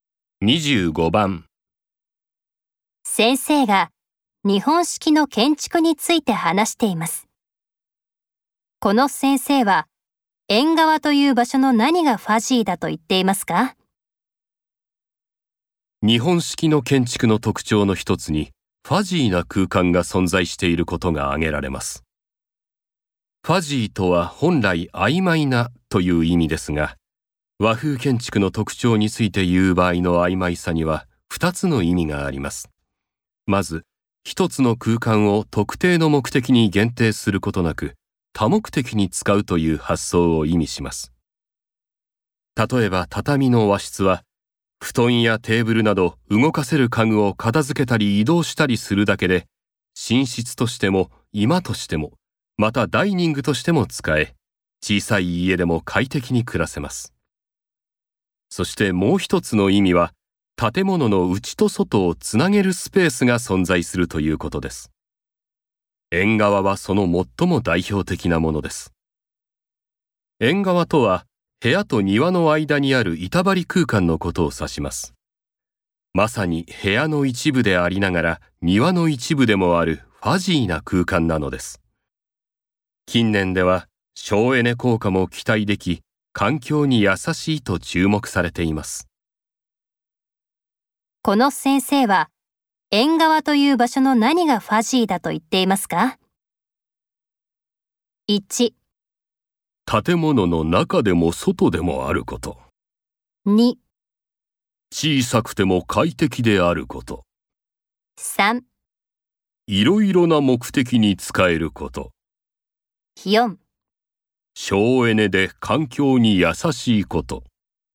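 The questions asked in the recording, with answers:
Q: この先生は縁側という場所の何がファジーだと言っていますか?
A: 1: 建物の中でも外でもあること。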